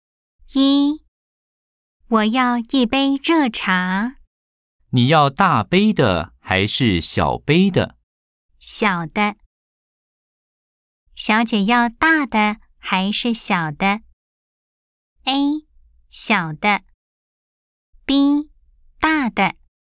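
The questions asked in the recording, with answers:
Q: 小姐要大的还是小的?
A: A: 小的。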